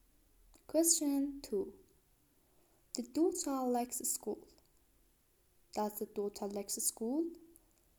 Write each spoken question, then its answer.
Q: Does the daughter like school?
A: Yes, she likes school.